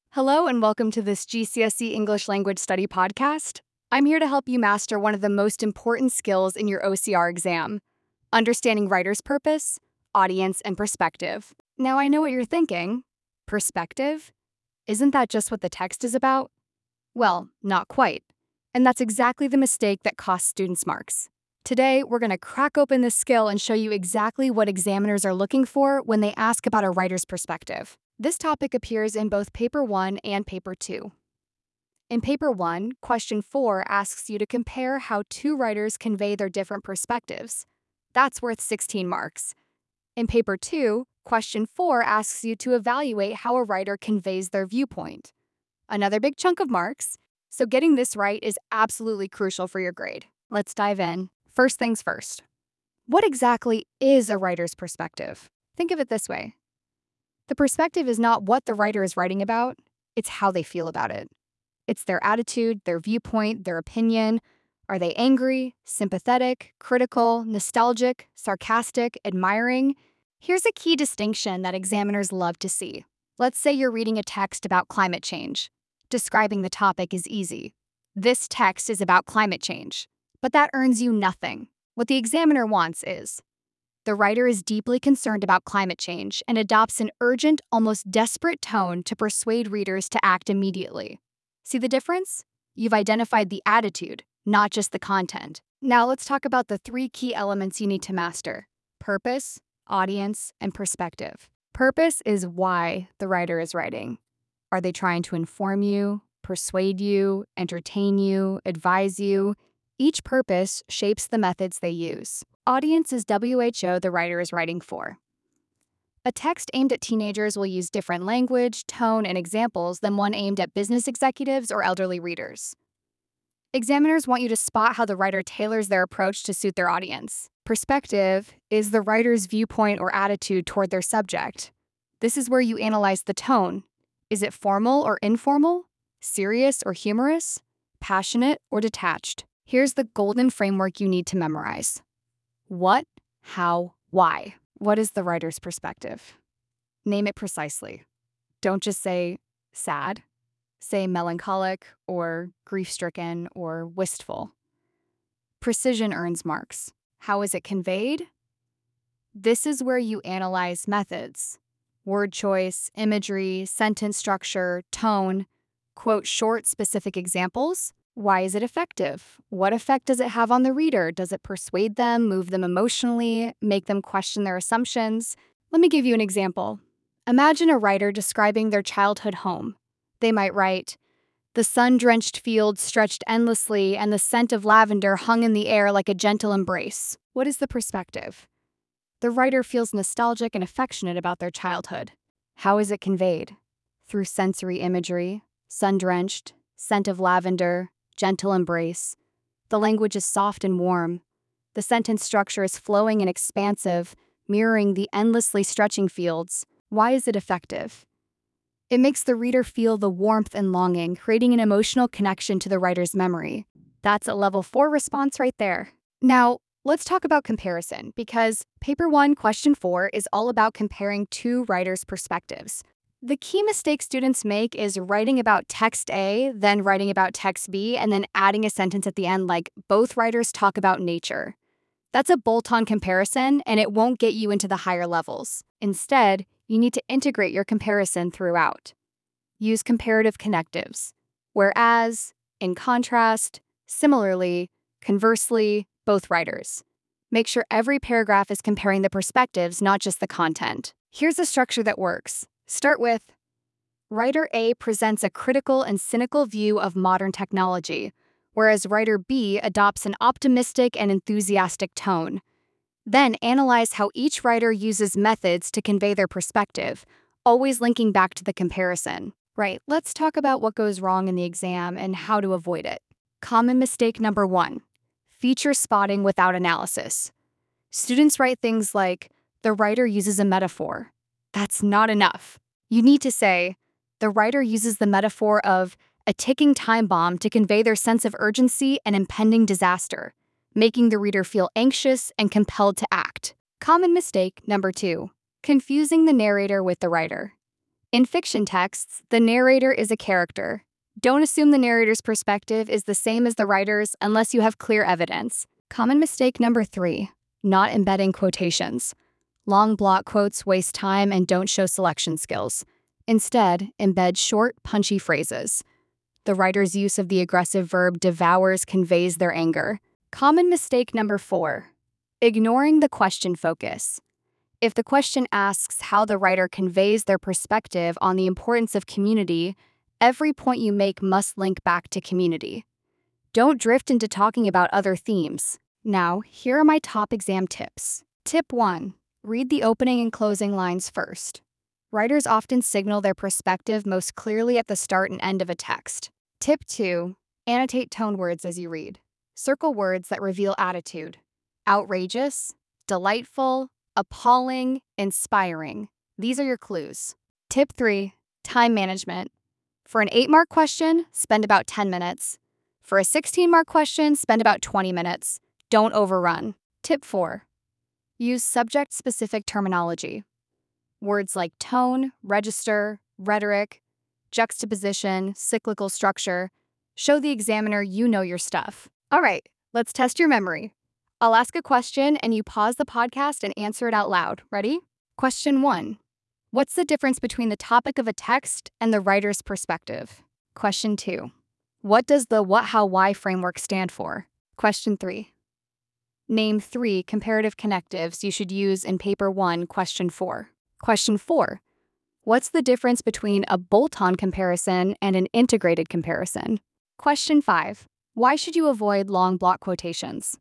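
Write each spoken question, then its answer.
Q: what's the difference between the topic of a text and the writer's perspective?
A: The topic is what the text is about; the perspective is how the writer feels about it (their attitude or viewpoint)

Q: what does the what, how, why framework stand for?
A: What is the writer's perspective, how is it conveyed, and why is it effective

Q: name three comparative connectives you should use in paper one, question four.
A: Any three of: whereas, in contrast, similarly, conversely, both writers

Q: what's the difference between a bolt-on comparison and an integrated comparison?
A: A bolt-on comparison discusses each text separately and adds one comparing sentence at the end; an integrated comparison compares the perspectives all the way through, in every paragraph

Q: why should you avoid long block quotations?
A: They waste time and don't show selection skills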